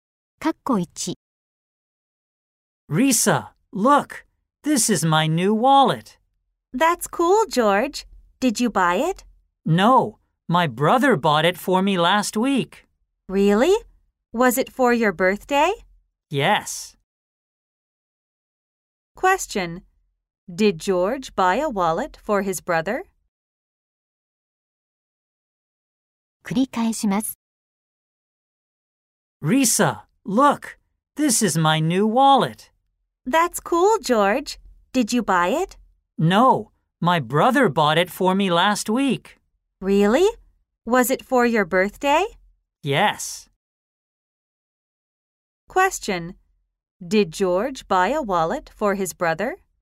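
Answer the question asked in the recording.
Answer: No, he didn't. His brother bought it for him.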